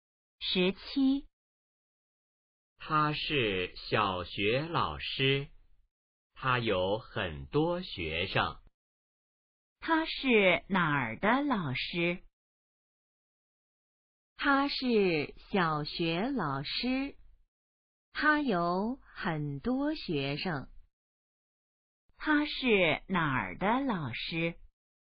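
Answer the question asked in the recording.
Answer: 小学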